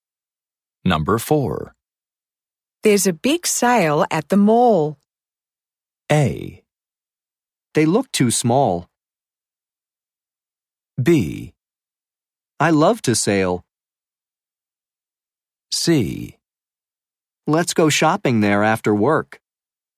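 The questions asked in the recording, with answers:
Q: There's a big sale at the mall.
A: C: Let's go shopping there after work.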